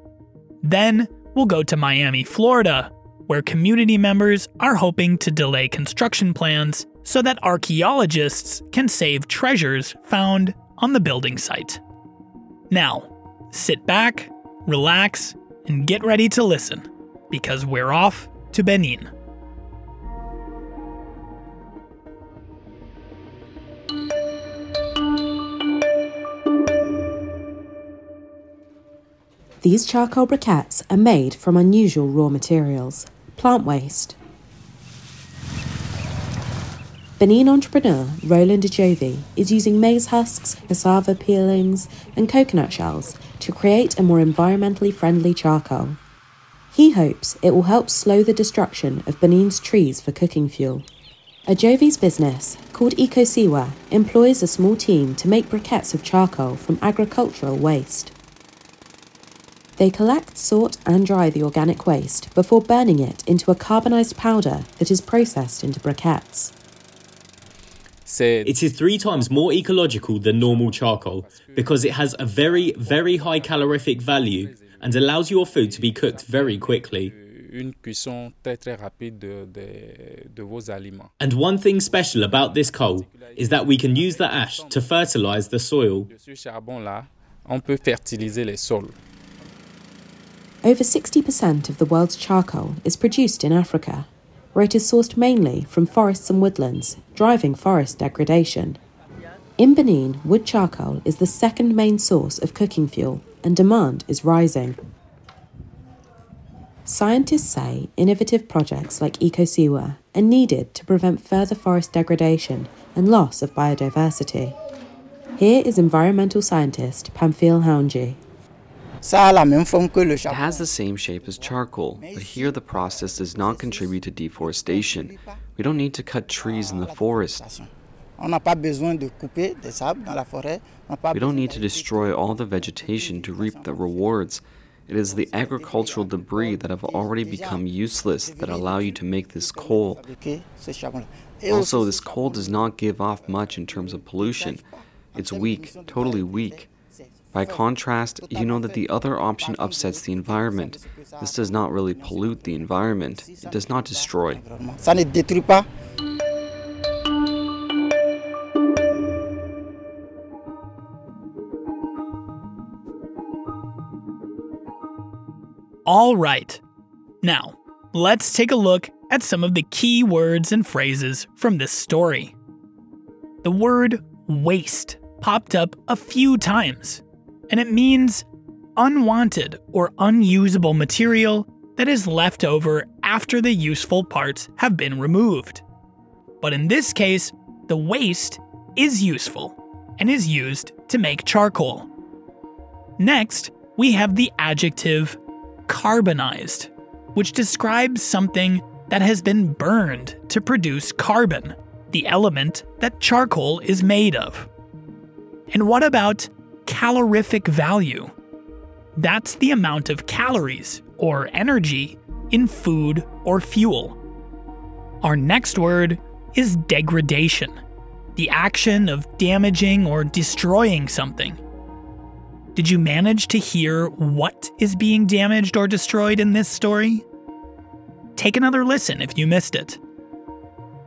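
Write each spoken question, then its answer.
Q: Did you manage to hear what is being damaged or destroyed in this story?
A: Forests (Benin's trees and woodlands)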